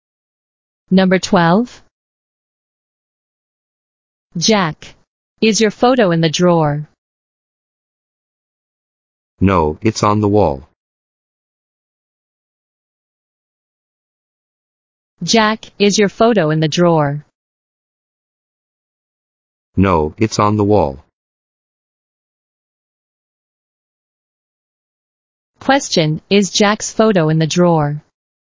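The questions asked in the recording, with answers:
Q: is Jack's photo in the drawer?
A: No, it's on the wall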